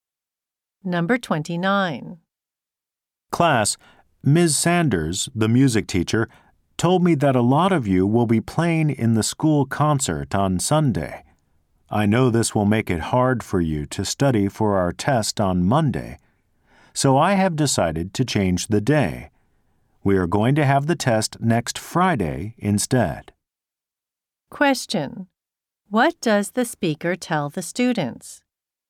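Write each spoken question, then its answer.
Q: What does the speaker tell the students?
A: The test has been moved to next Friday.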